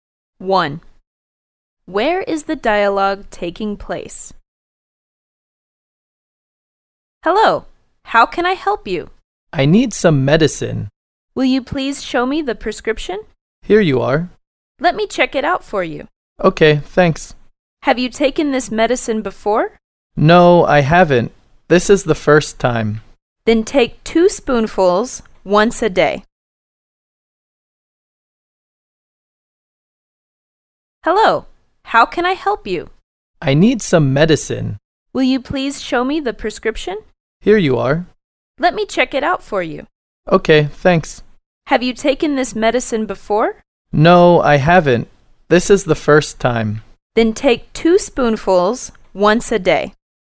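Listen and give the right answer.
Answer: At a pharmacy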